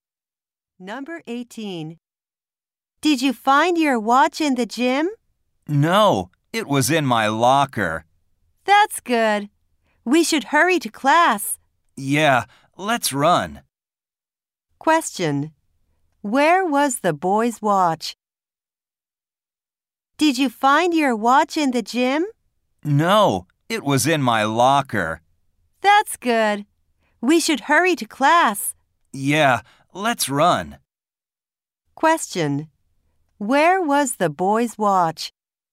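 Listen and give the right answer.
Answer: In his locker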